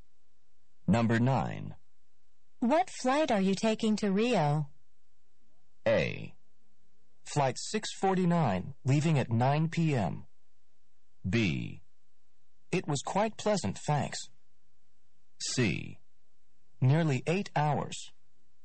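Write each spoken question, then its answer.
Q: What flight are you taking to Rio?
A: A: Flight 649, leaving at 9 p.m.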